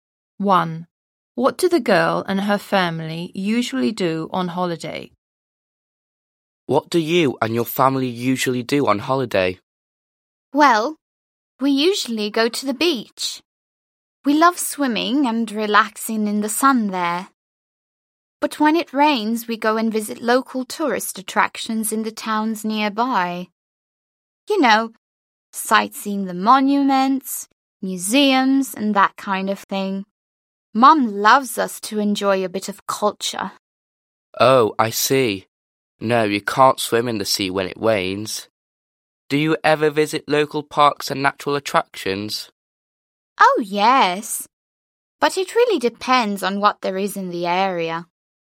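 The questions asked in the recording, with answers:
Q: What do the girl and her family usually do on holiday?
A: They go to the beach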